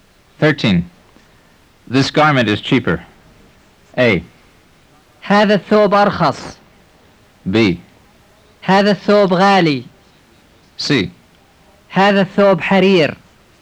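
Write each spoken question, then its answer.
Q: This garment is cheaper.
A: A: هذا الثوب أرخص.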